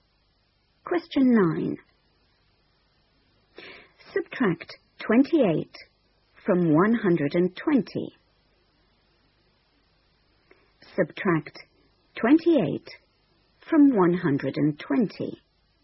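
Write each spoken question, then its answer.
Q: Subtract 28 from 120.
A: 92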